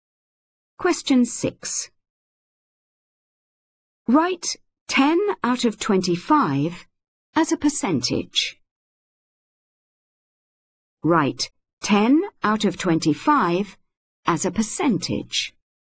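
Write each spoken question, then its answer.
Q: Write 10 out of 25 as a percentage.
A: 40%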